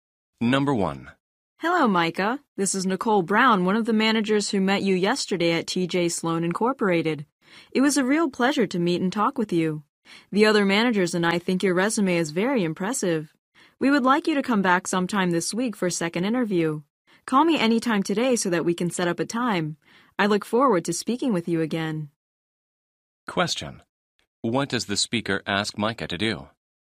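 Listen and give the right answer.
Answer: Call her to set up a second interview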